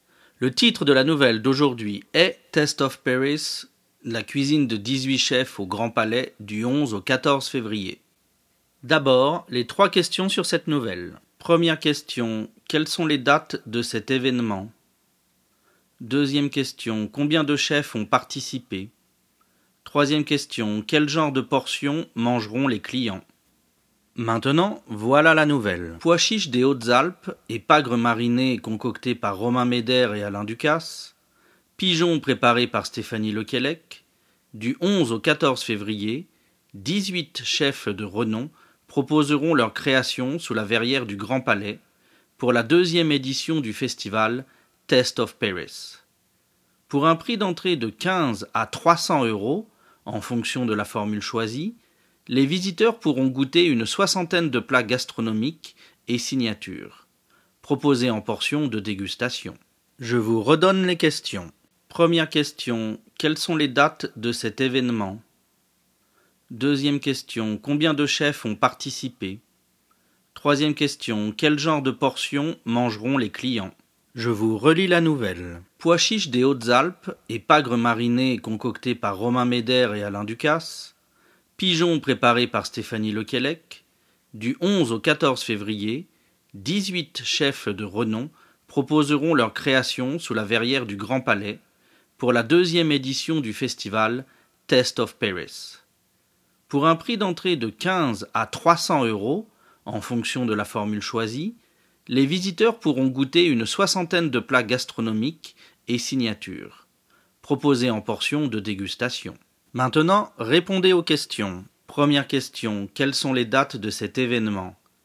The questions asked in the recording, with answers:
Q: quelles sont les dates de cet événement?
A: c'est du 11 au 14 février.

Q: combien de chefs ont participé?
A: 18 chefs ont participé.

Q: quel genre de portions mangeront les clients?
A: ils mangeront des portions de dégustation.